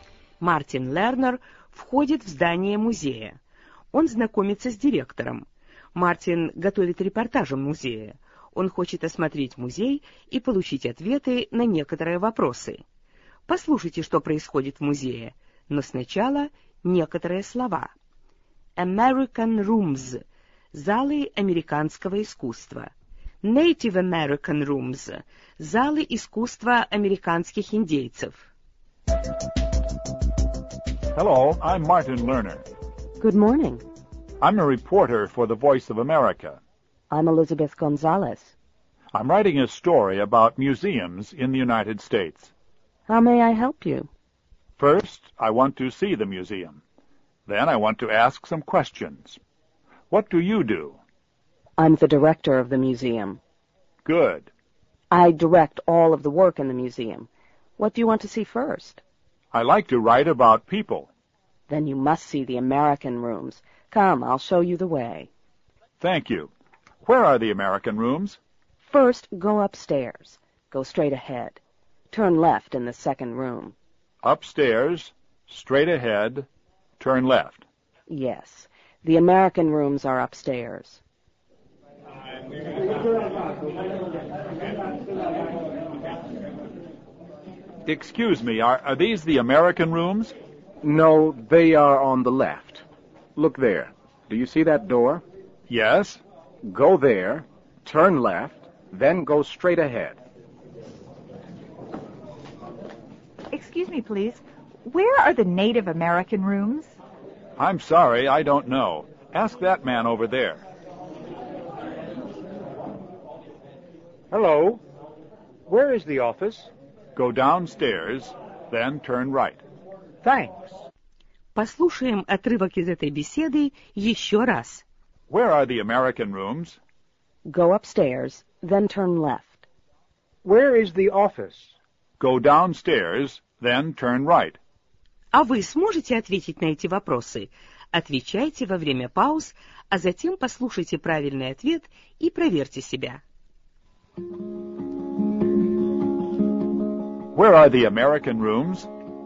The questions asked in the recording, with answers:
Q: Where are the American rooms?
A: Go upstairs, then turn left.